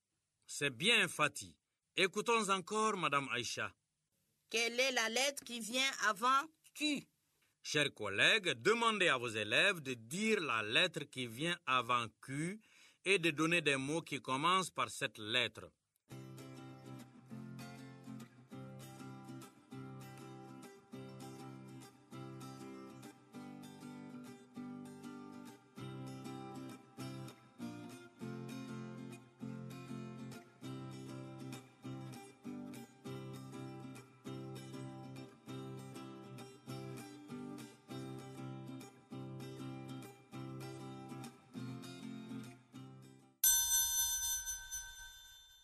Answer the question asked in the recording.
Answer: Monsieur, c'est la lettre P.